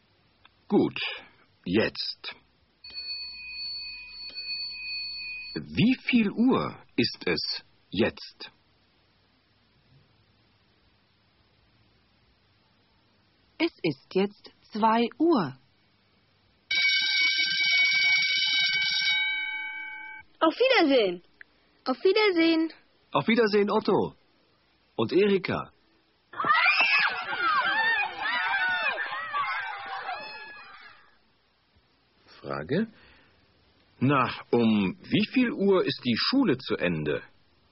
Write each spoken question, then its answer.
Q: Frage: Na, um wie viel Uhr ist die Schule zu Ende?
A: Die Schule ist um 2 Uhr aus.